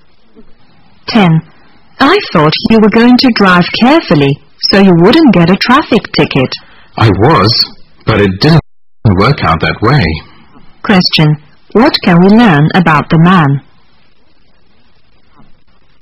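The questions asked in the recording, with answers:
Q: What can we learn about the man?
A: He got a traffic ticket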